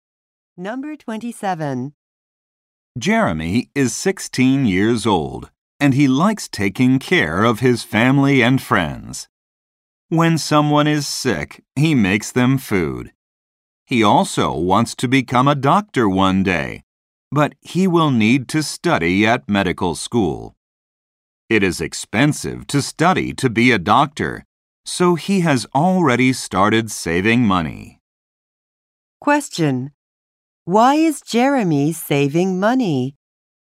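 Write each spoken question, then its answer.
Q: Why is Jeremy saving money?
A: To pay for medical school to become a doctor.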